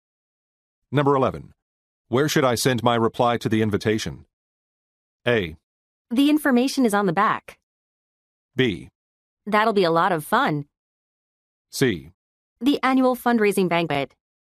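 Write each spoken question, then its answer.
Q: Where should I send my reply to the invitation?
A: A: The information is on the back.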